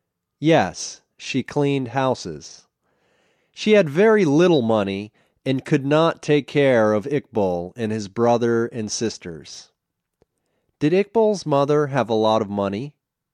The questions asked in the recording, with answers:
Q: Did Iqbal's mother have a lot of money?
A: No, she didn't have a lot of money.